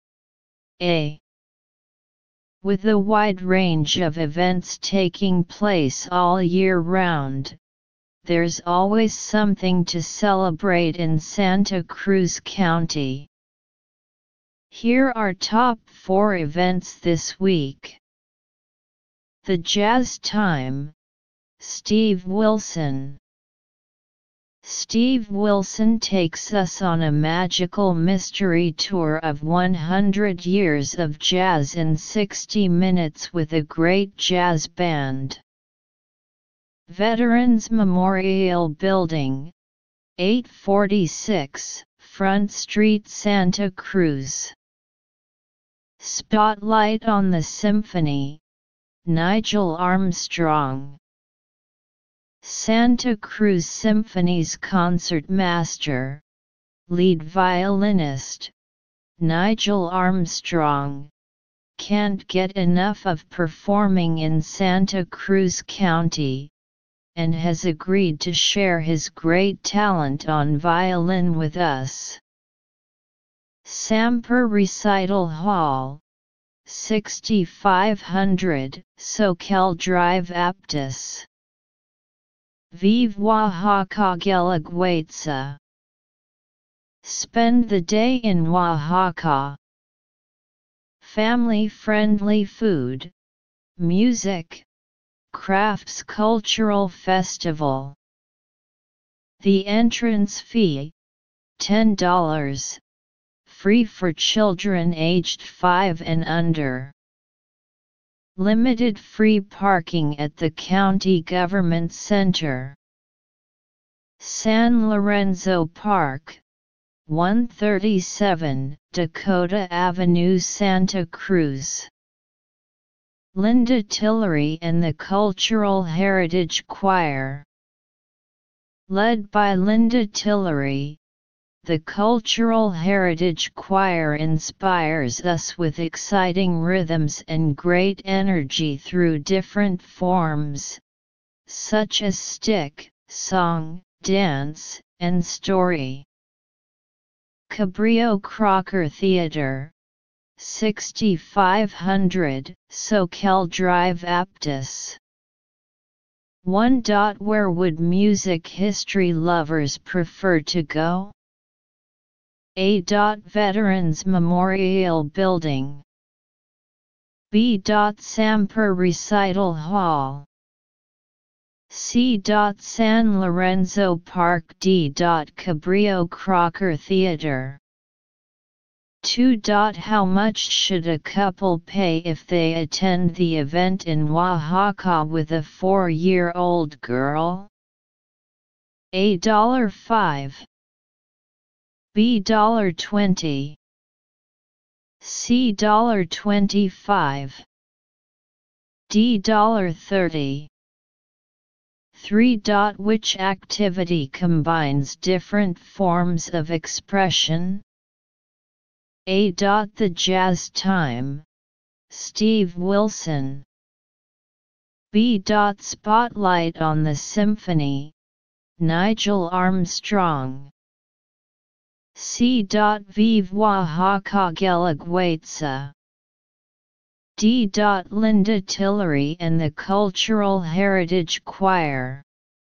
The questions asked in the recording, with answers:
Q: Where would music history lovers prefer to go?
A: 1. A

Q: How much should a couple pay if they attend the event in Oaxaca with a 4-year-old girl?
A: 2. B

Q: Which activity combines different forms of expression?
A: 3. D.